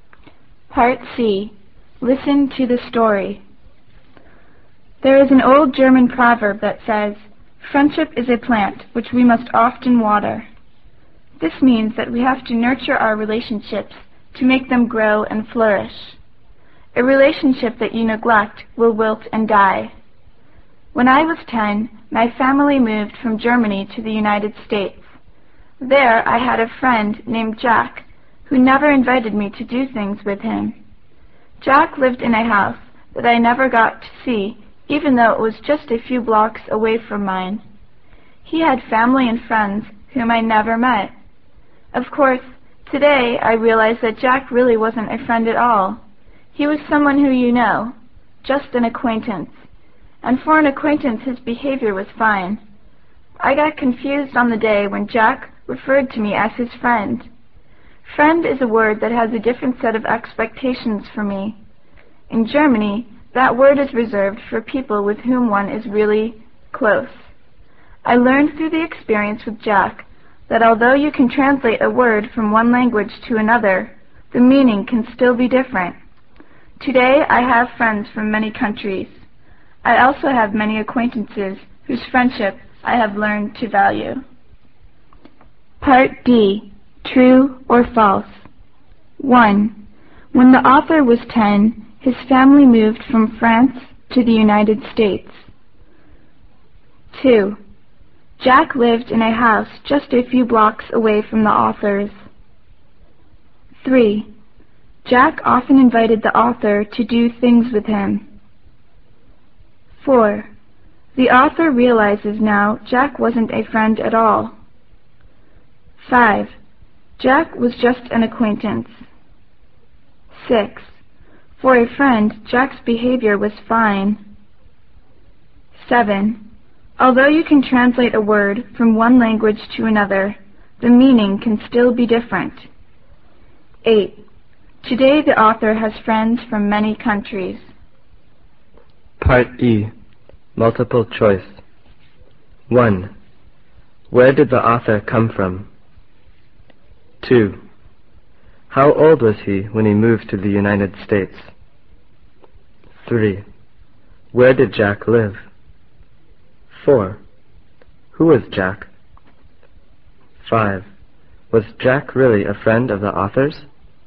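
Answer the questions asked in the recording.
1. False
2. True
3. False
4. True
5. True
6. False
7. True
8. True
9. Germany
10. 10
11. In a house a few blocks away from the author's
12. An acquaintance of the author's
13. No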